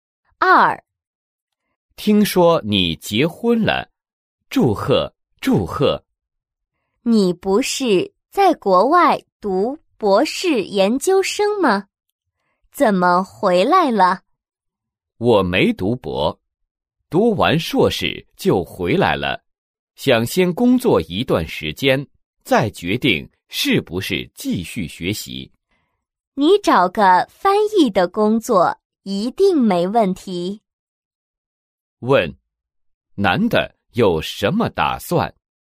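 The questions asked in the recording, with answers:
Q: 问,男的有什么打算?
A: 先工作一段时间,再决定是否继续学习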